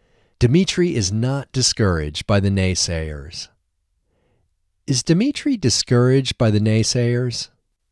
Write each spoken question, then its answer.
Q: Is Dmitri discouraged by the naysayers?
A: No, Dmitri is not discouraged by the naysayers.